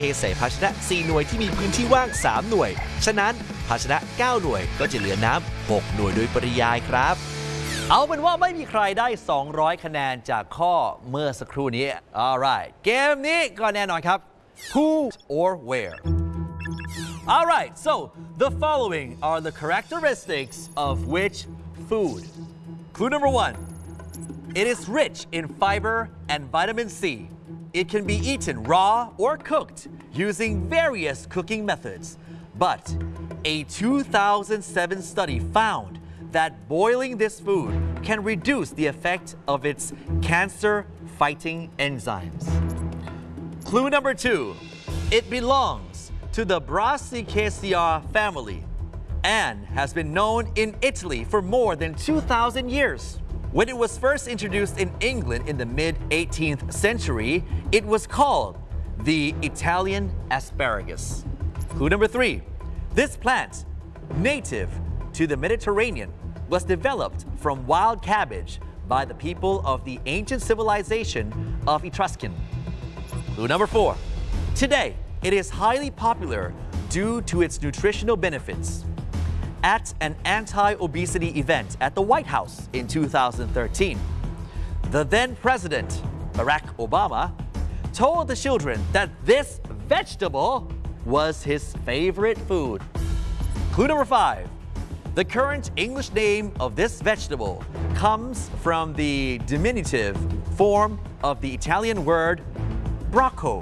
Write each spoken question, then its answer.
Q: All right so the following are the characteristics of which food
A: broccoli.